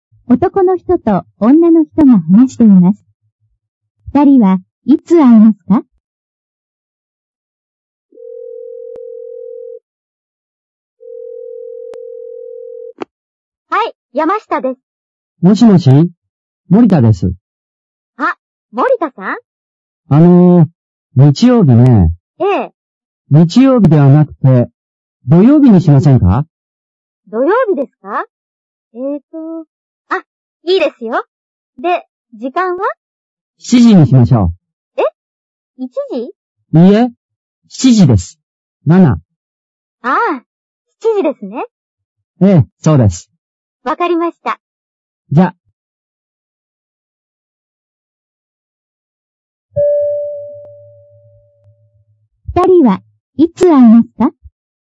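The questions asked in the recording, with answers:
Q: 二人はいつ会いますか?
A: 土曜日の7時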